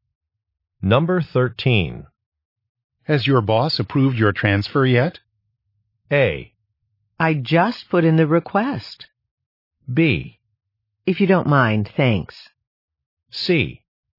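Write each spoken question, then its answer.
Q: Has your boss approved your transfer yet?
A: A: I just put in the request.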